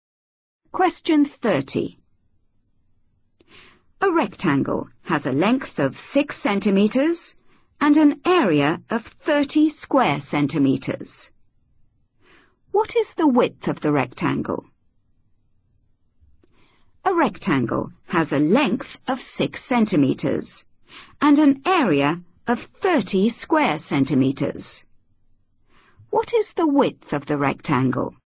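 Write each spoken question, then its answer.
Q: What is the width of the rectangle?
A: 5 centimetres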